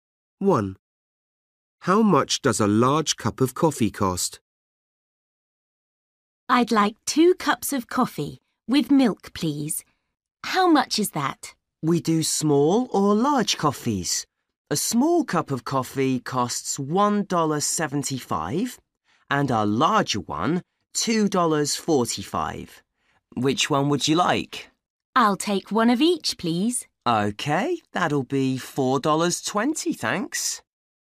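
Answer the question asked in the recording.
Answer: $2.45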